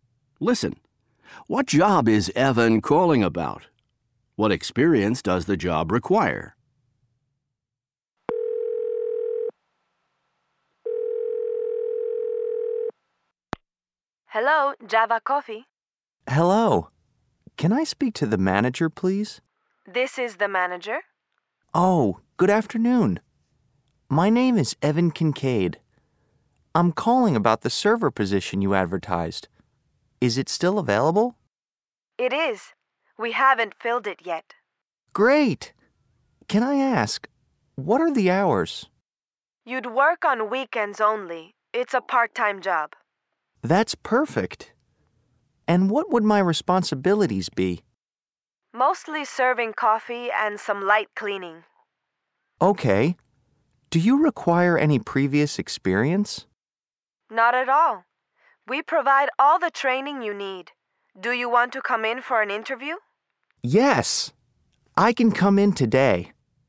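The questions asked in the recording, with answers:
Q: What job is Evan calling about?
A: The server position at Java Coffee

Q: What experience does the job require?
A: None; they provide all the training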